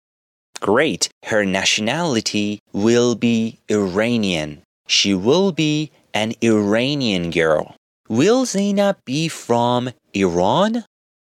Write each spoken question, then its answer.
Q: Will Zainab be from Iran?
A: Yes, she will be from Iran because her nationality is Iranian.